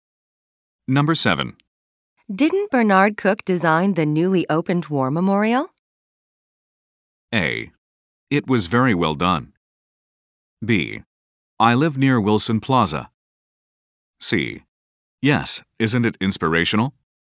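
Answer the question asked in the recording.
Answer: C: Yes, isn't it inspirational?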